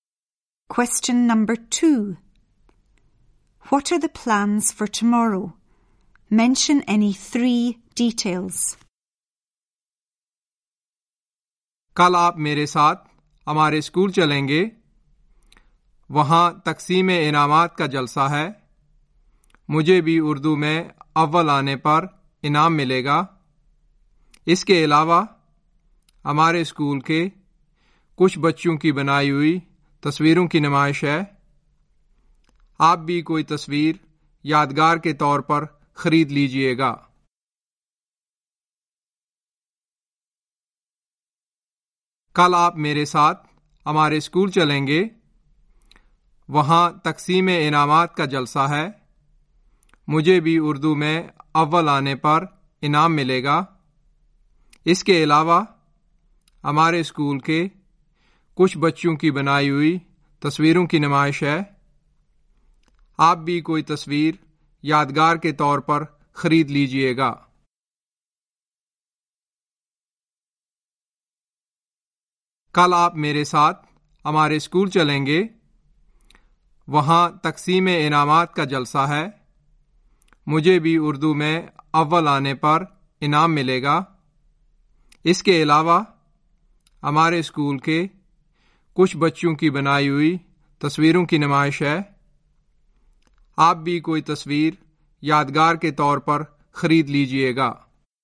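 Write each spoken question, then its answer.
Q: What are the plans for tomorrow?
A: Going to Jamil's school for a prize-giving ceremony; Jamil will get a prize for coming first in Urdu; there is an exhibition of pupils' paintings; you can buy a painting as a souvenir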